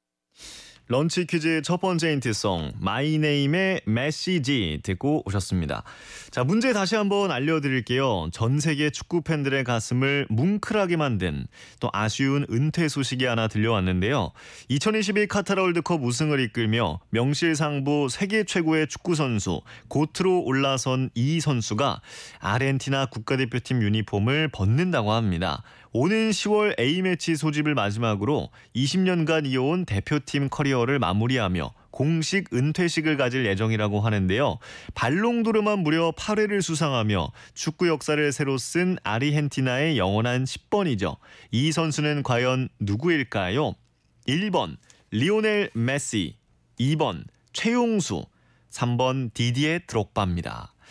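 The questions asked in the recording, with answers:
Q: 이 선수는 과연 누구일까요?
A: 1번: 리오넬 메시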